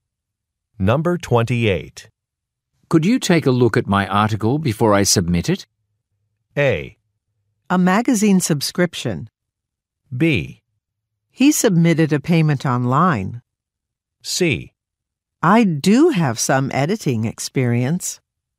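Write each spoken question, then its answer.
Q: Could you take a look at my article before I submit it?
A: C: I do have some editing experience.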